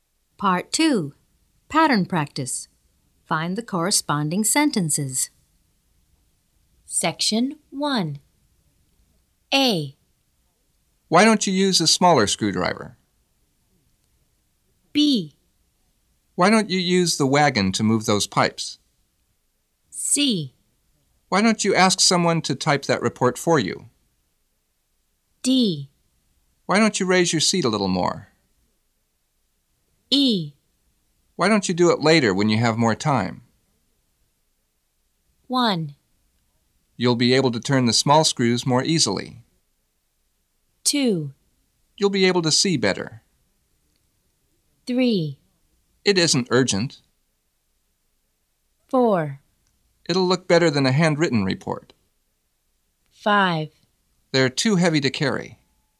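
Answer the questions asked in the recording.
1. A: Why don't you use a smaller screwdriver?
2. D: Why don't you raise your seat a little more?
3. E: Why don't you do it later when you have more time?
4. C: Why don't you ask someone to type that report for you?
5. B: Why don't you use the wagon to move those pipes?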